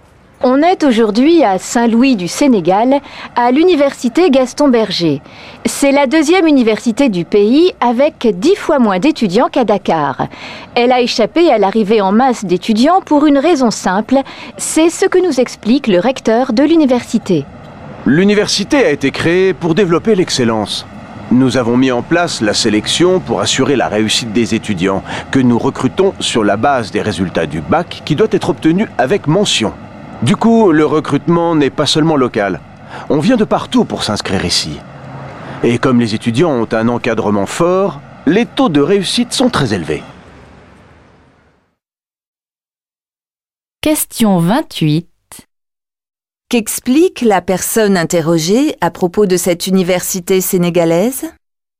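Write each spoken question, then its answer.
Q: Qu'explique la personne interrogée à propos de cette université sénégalaise ?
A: Elle sélectionne ses étudiants sur la base des résultats du bac, obtenu avec mention.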